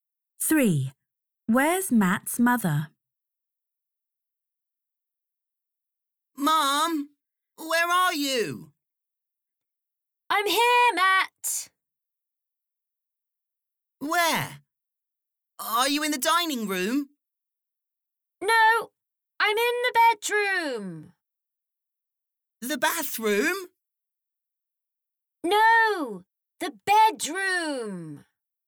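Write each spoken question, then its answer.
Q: Where's Matt's mother?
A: in the bedroom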